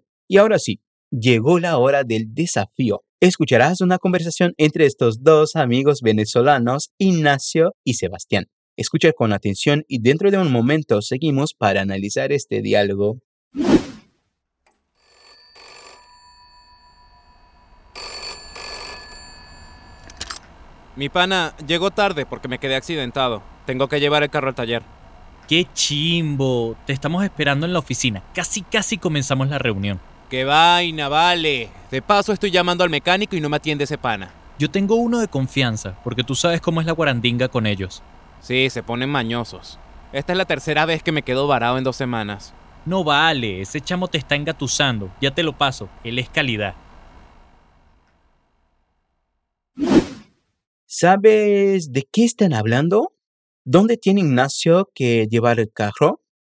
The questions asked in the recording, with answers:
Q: ¿Dónde tiene Ignacio que llevar el carro?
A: Tengo que llevar el carro al taller.